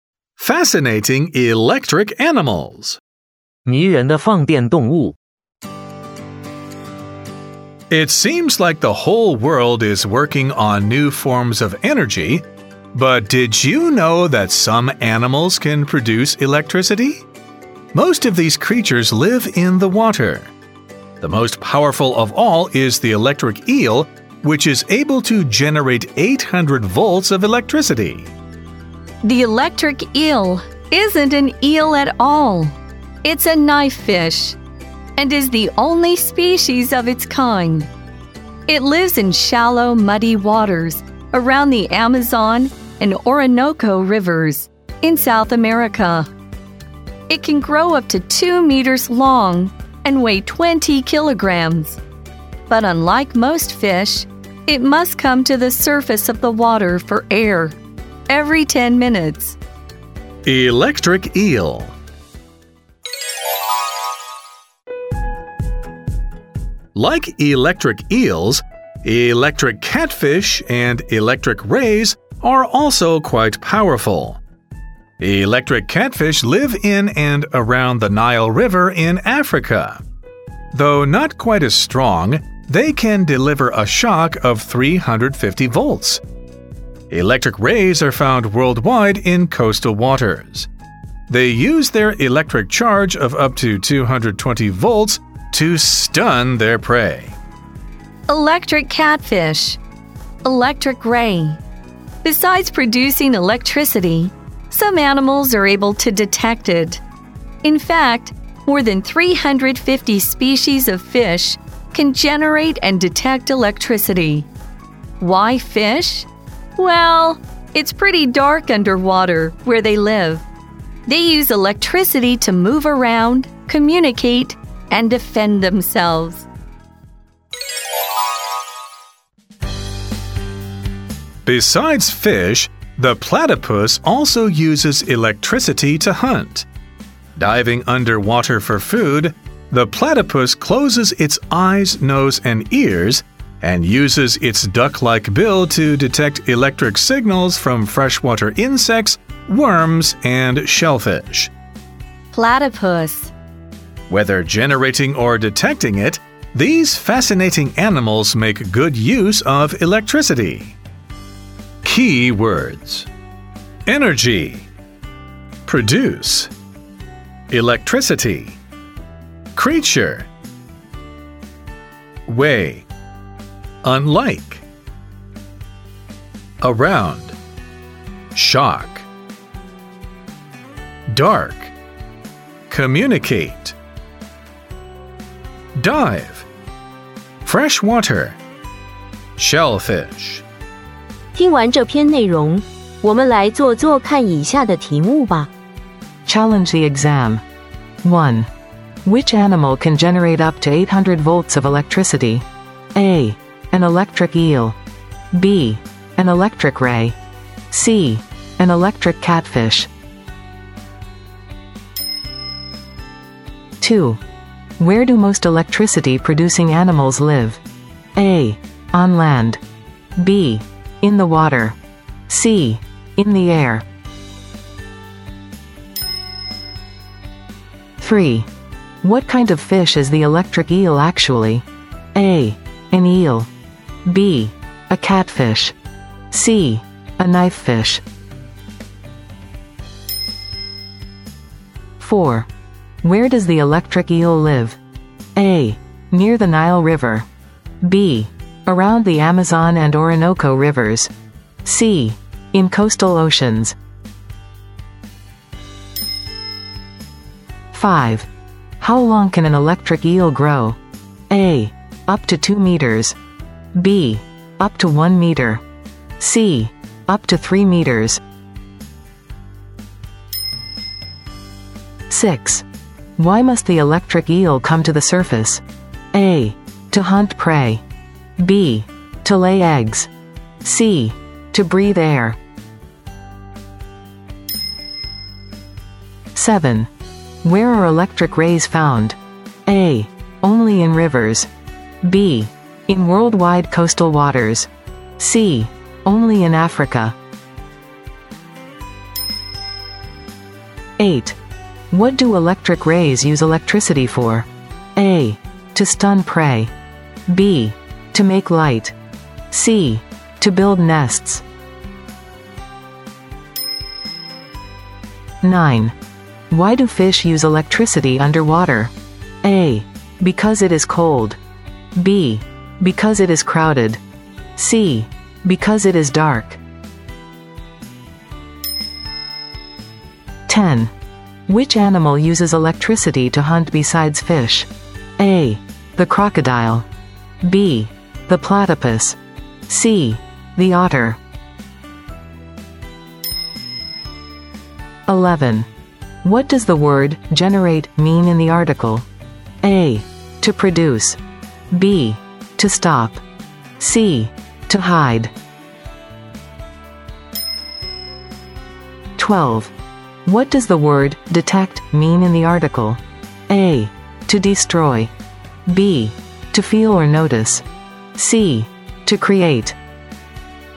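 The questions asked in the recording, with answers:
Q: Which animal can generate up to 800 volts of electricity?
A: A: An electric eel.

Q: Where do most electricity-producing animals live?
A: B: In the water.

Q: What kind of fish is the electric eel actually?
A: C: A knifefish.

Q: Where does the electric eel live?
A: B: Around the Amazon and Orinoco rivers.

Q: How long can an electric eel grow?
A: A: Up to 2 meters.

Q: Why must the electric eel come to the surface?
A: C: To breathe air.

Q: Where are electric rays found?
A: B: In worldwide coastal waters.

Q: What do electric rays use electricity for?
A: A: To stun prey.

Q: Why do fish use electricity underwater?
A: C: Because it is dark.

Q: Which animal uses electricity to hunt besides fish?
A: B: The platypus.

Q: What does the word generate mean in the article?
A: A: To produce.

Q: What does the word detect mean in the article?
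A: B: To feel or notice.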